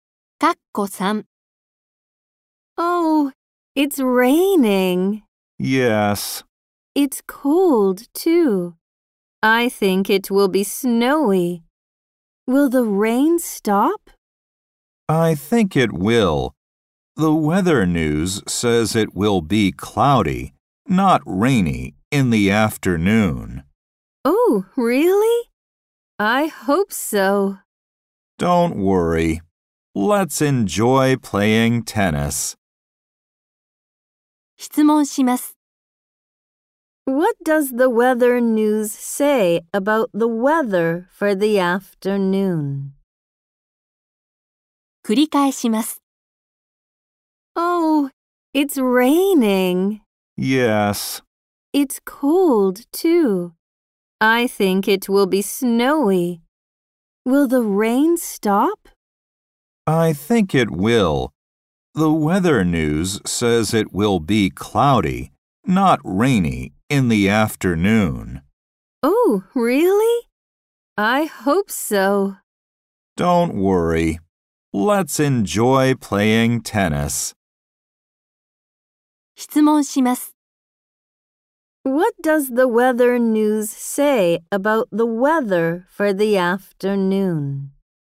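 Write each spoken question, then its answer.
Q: What does the weather news say about the weather for the afternoon?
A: It will be cloudy.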